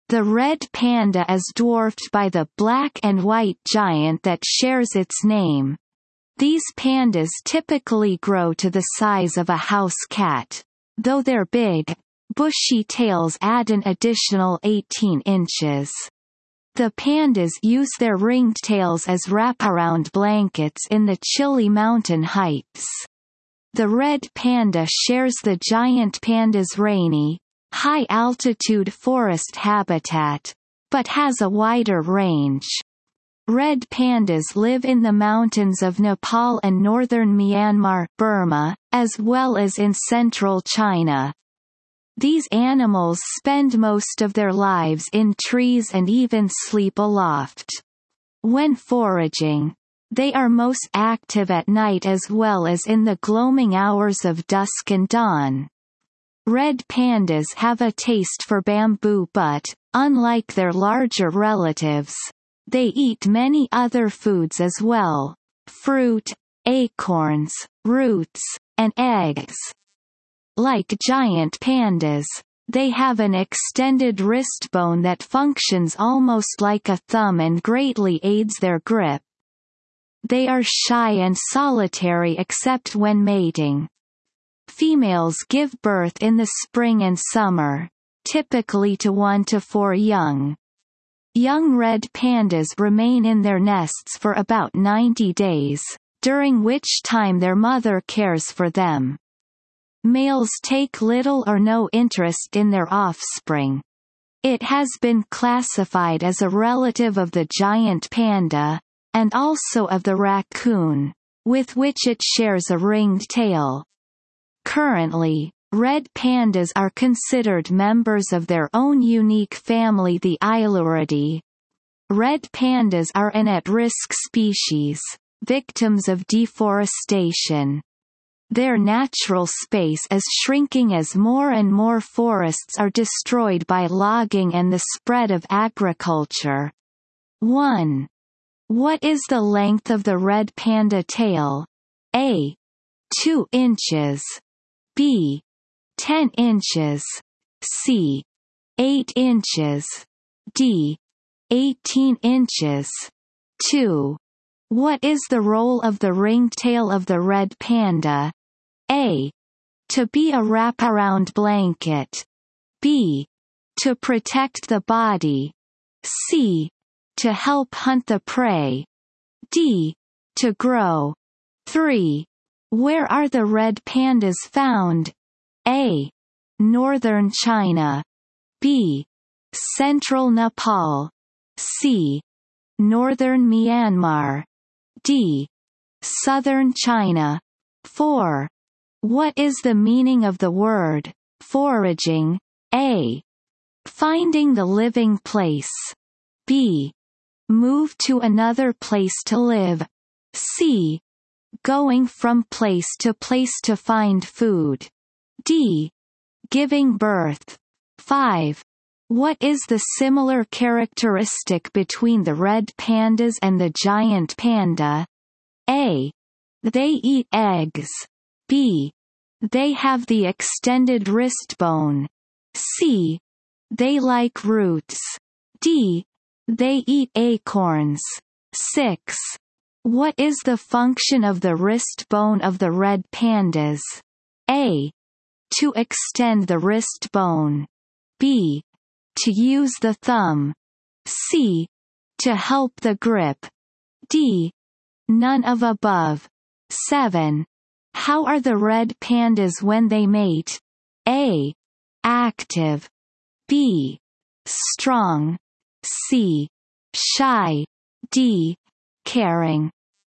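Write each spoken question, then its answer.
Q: What is the length of the red panda tail?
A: D: 18 inches

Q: What is the role of the ringed tail of the red panda?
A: A: To be a wraparound blanket

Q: Where are the red pandas found?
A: C: Northern Myanmar

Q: What is the meaning of the word foraging?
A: C: Going from place to place to find food

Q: What is the similar characteristic between the red pandas and the giant panda?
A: B: They have the extended wrist bone

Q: What is the function of the wrist bone of the red pandas?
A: C: To help the grip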